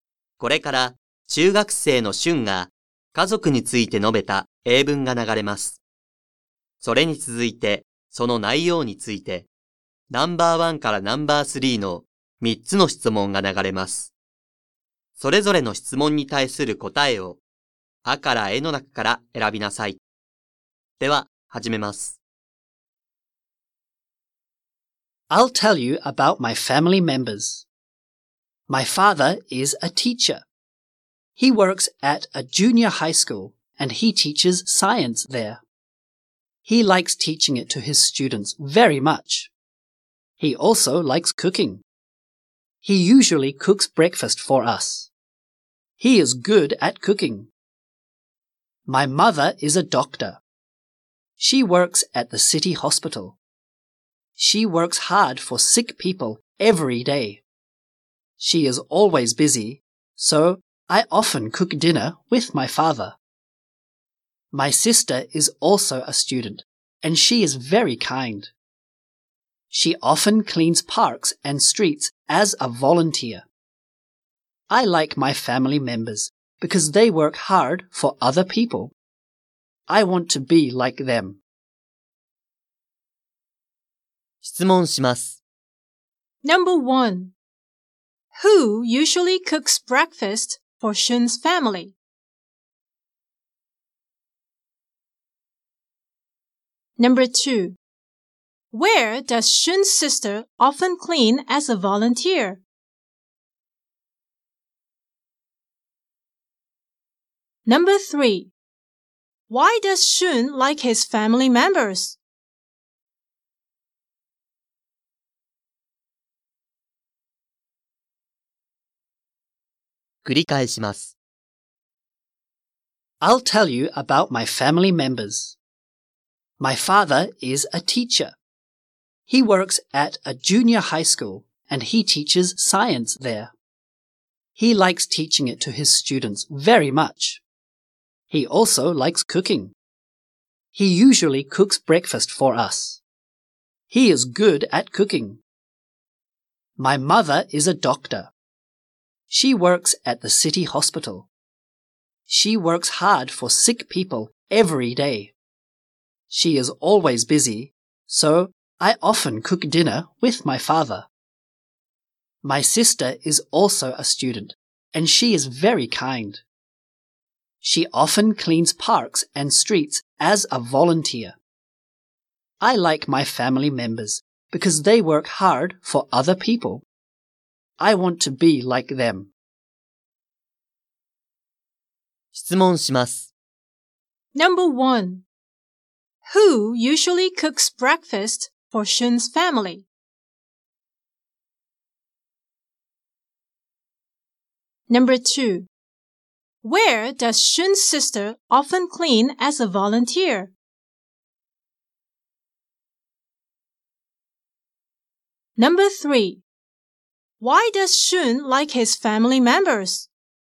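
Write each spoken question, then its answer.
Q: Who usually cooks breakfast for Shun's family?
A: His father

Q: Where does Shun's sister often clean as a volunteer?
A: Parks and streets

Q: Why does Shun like his family members?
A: Because they work hard for other people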